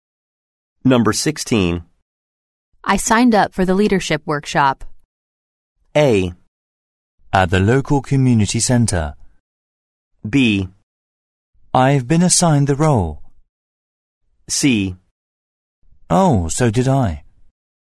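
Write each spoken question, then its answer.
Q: I signed up for the leadership workshop.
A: C: Oh, so did I.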